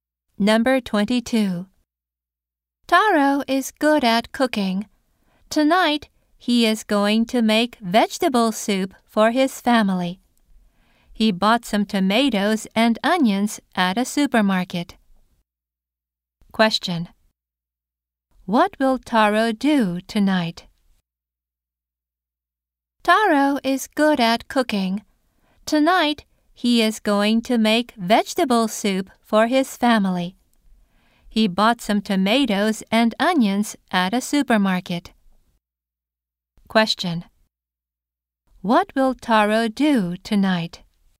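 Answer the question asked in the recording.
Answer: Make vegetable soup for his family.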